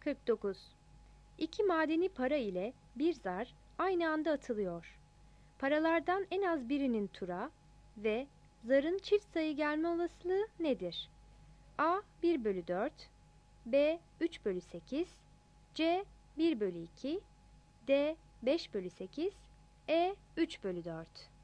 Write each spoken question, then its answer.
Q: Paralardan en az birinin tura ve Zarın çift sayı gelme olasılığı nedir?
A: 49 B